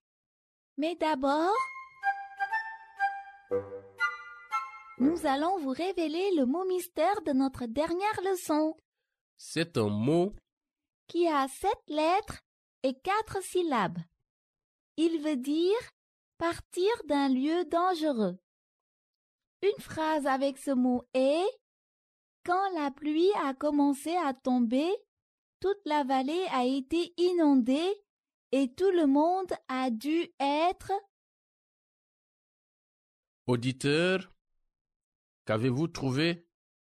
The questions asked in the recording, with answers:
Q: Auditeur, qu'avez-vous trouvé?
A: Le mot mystère d'aujourd'hui est « évacuer ».